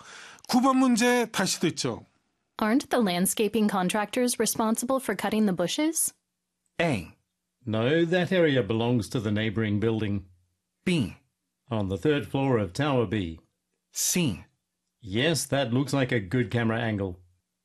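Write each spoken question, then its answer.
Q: Aren't the landscaping contractors responsible for cutting the bushes?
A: A: No, that area belongs to the neighboring building.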